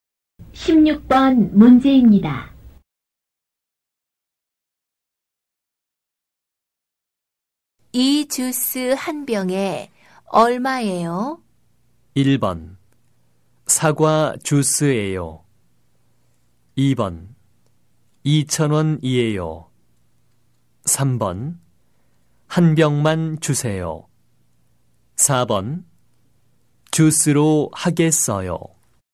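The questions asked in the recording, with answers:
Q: 이 주스 한 병에 얼마예요?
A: 2: 2,000원이에요.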